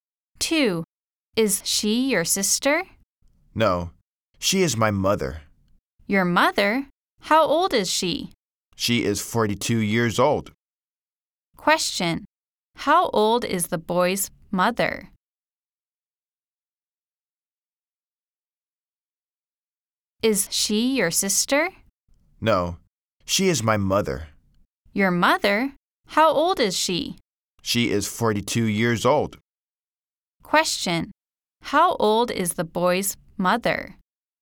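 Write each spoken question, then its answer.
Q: Question, how old is the boy's mother?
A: 42 years old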